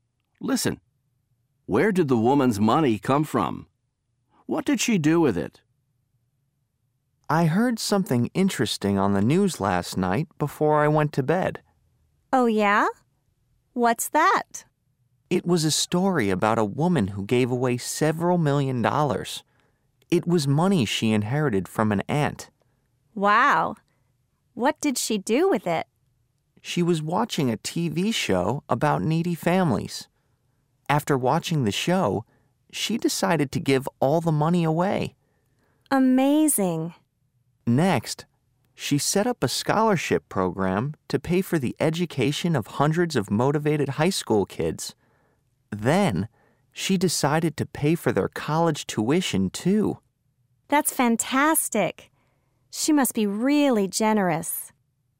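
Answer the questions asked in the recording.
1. She inherited it from an aunt.
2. She gave it away; she set up a scholarship program for motivated high school kids and paid their college tuition.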